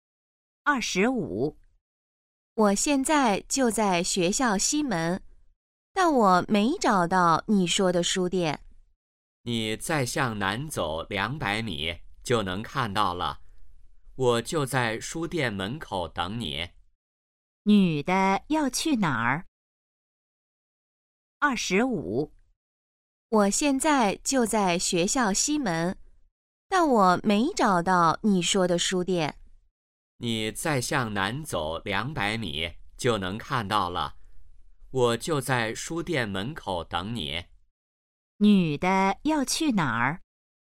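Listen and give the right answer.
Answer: 书店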